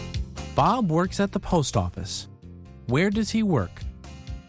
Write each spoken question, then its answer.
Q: Where does he work?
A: He works at the post office.